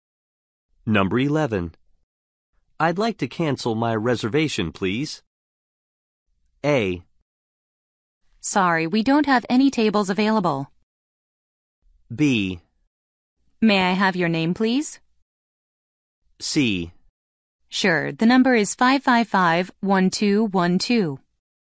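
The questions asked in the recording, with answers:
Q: I'd like to cancel my reservation, please.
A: B: May I have your name, please?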